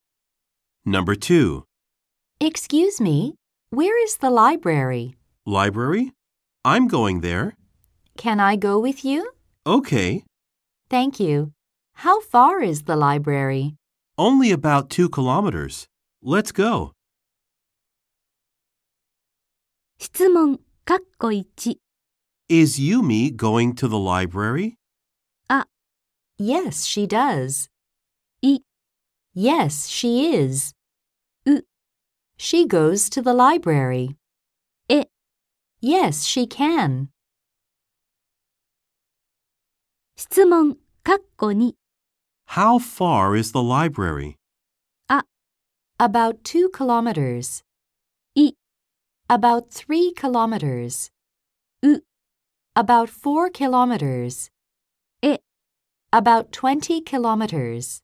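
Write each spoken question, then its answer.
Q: Is Yumi going to the library?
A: I: Yes, she is.

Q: How far is the library?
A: A: About 2 kilometers.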